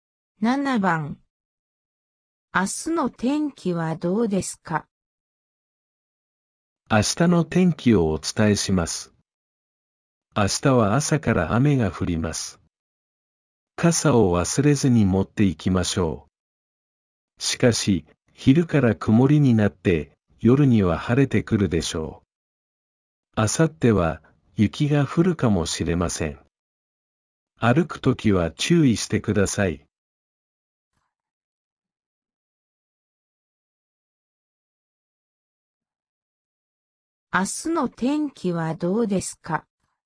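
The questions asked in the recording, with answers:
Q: 明日の天気はどうですか?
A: 朝は雨、昼から曇り、夜は晴れ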